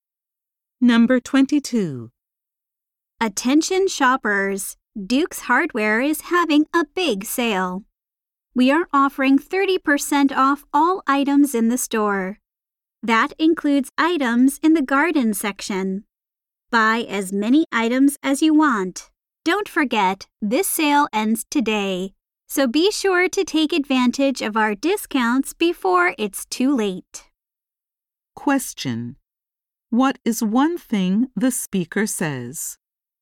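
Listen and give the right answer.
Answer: Everything in the store is 30% off, and the sale ends today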